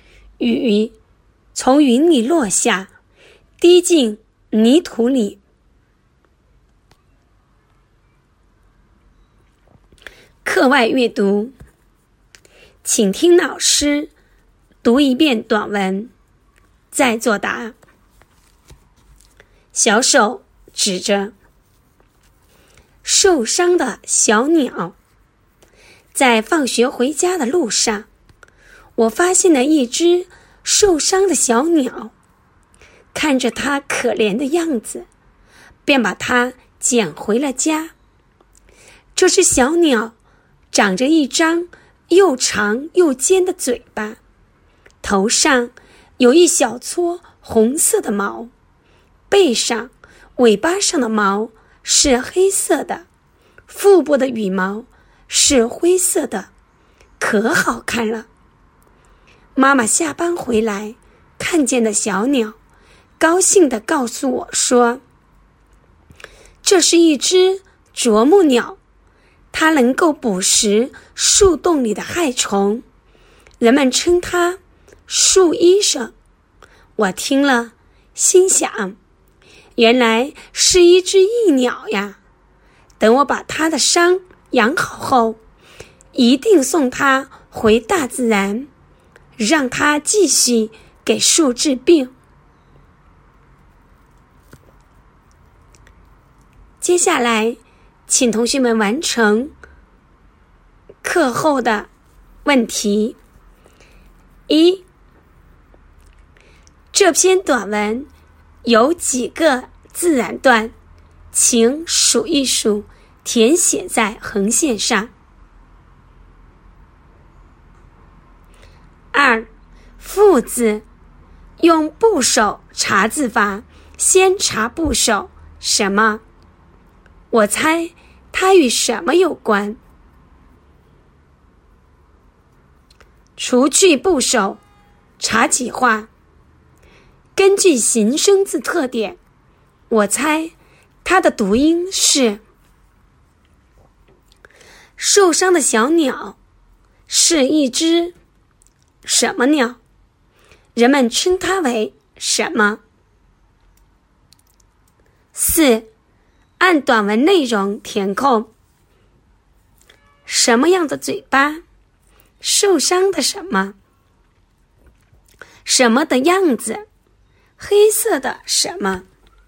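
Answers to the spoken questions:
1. 啄木鸟;人们称它为树医生
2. 又长又尖的嘴巴
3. 可怜的样子
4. 黑色的毛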